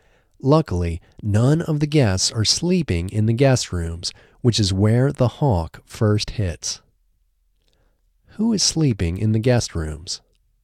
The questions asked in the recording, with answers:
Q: Who is sleeping in the guest rooms?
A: No one is sleeping in the guest rooms.